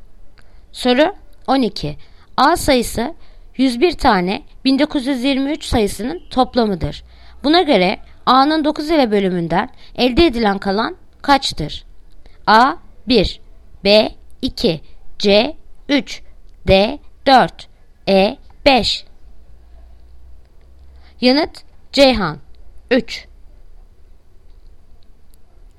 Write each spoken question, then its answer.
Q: Buna göre A'nın 9 ile bölümünden elde edilen kalan kaçtır?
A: Yanıt Ceyhan 3.